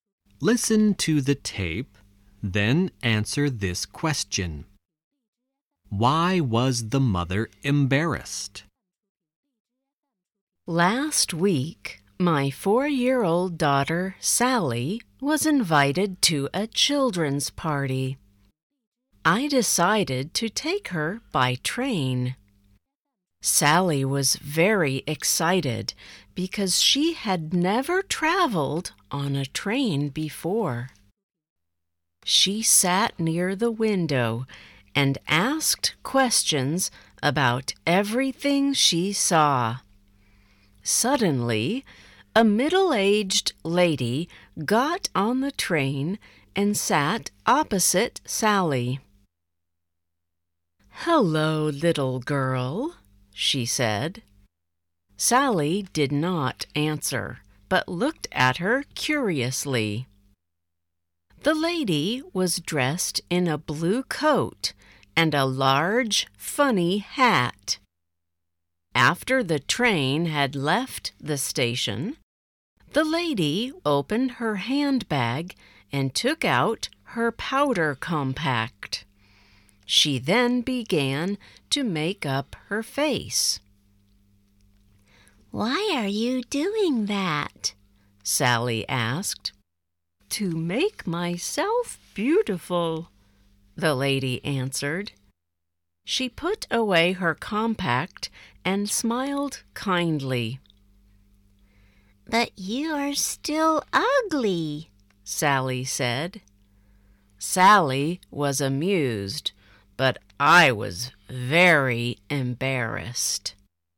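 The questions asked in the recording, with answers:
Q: Why was the mother embarrassed?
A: Because Sally told the lady she was still ugly.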